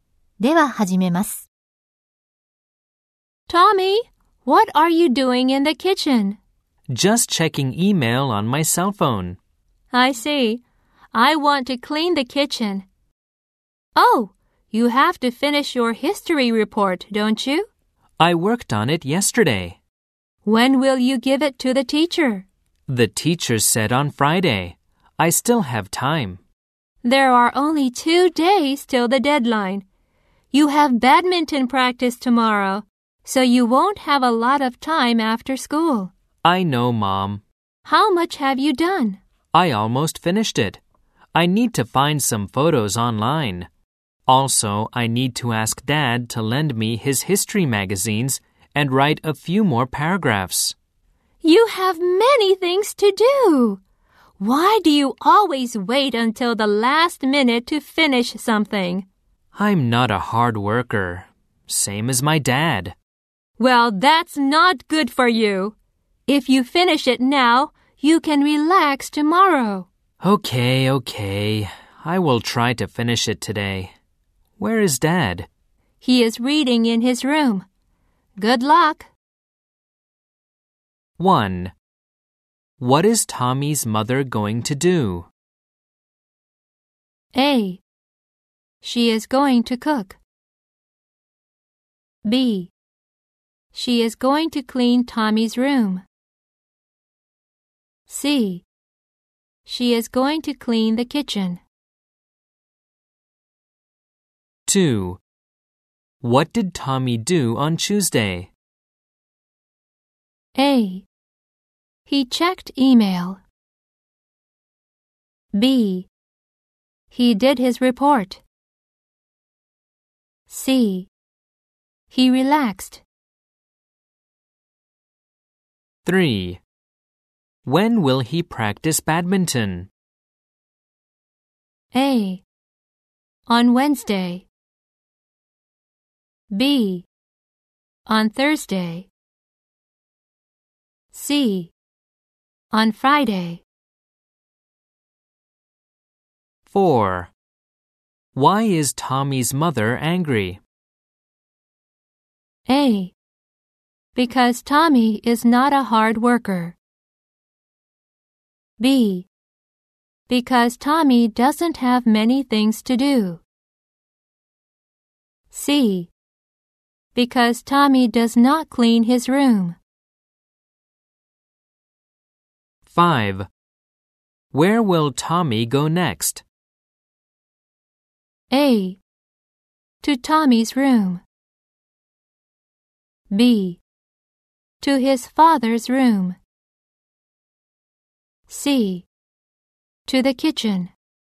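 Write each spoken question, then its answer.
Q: What is Tommy's mother going to do?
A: C: She is going to clean the kitchen.

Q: What did Tommy do on Tuesday?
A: B: He did his report.

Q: When will he practice badminton?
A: B: On Thursday.

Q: Why is Tommy's mother angry?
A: A: Because Tommy is not a hard worker.

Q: Where will Tommy go next?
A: B: To his father's room.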